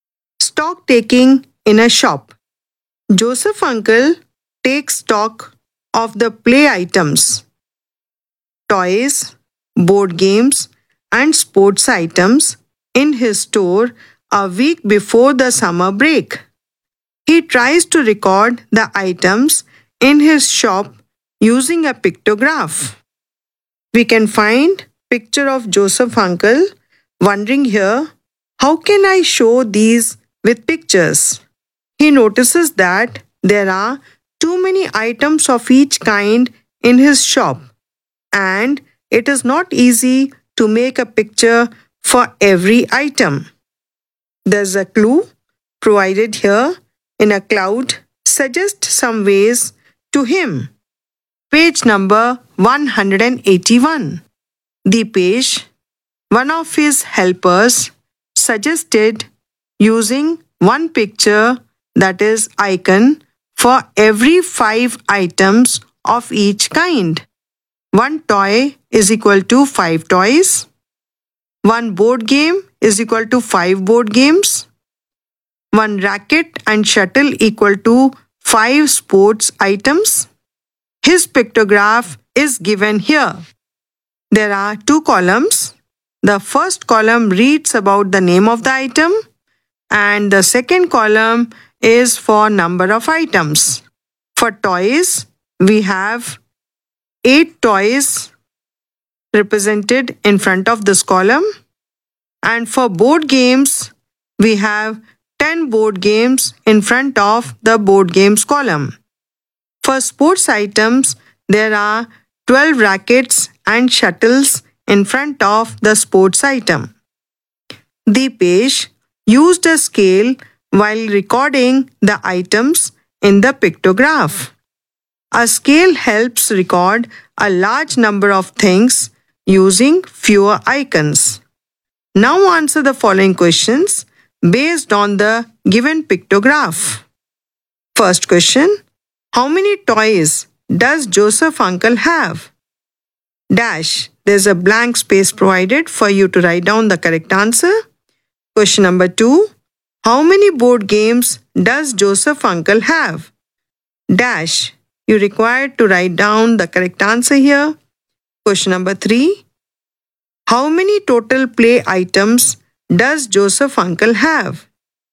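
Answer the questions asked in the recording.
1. 40
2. 50
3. 150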